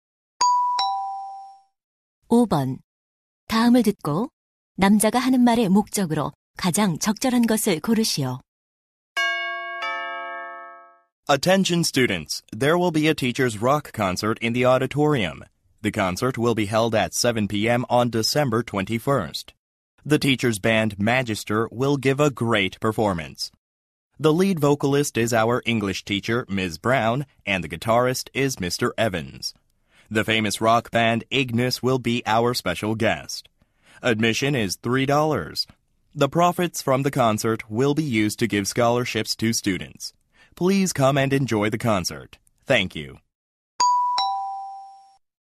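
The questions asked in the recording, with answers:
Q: 다음을 듣고 남자가 하는 말의 목적으로 가장 적절한 것을 고르시오.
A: 교사 록 콘서트를 홍보하려고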